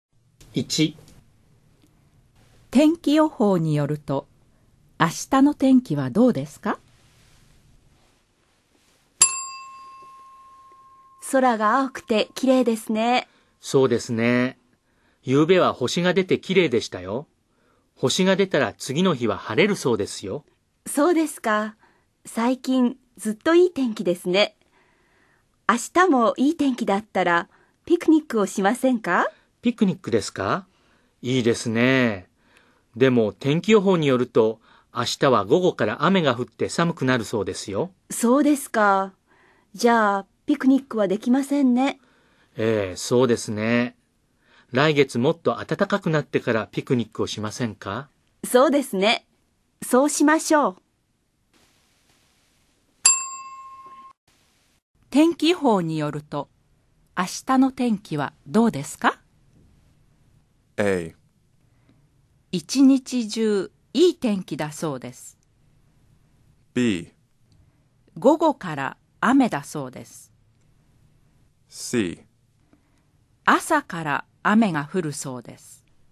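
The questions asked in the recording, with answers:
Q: 天気予報によると、明日の天気はどうですか?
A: B: 午後から雨だそうです。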